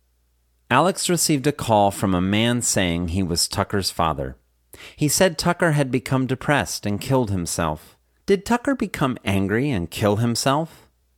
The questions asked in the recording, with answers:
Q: Did Tucker become angry and kill himself?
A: No, Tucker didn't become angry and kill himself.